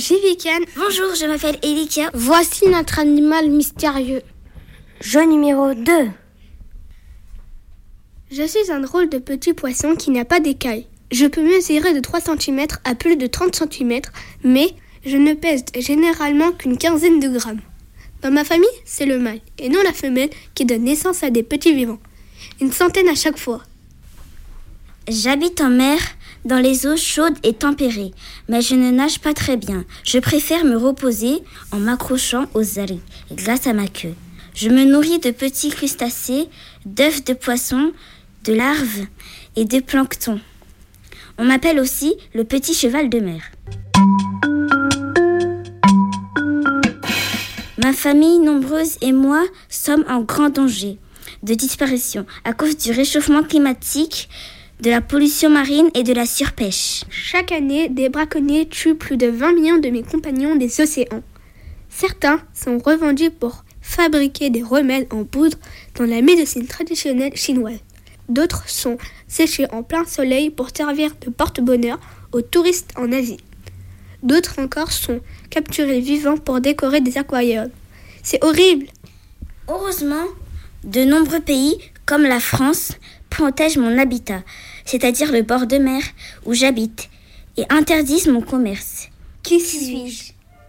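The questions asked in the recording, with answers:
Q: Qui suis-je?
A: l'hippocampe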